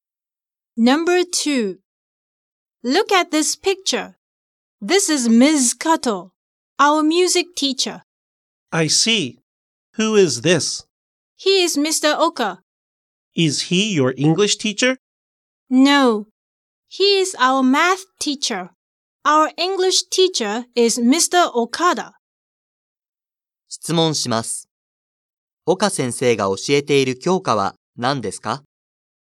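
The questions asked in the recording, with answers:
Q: 岡先生が教えている教科は何ですか?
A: 数学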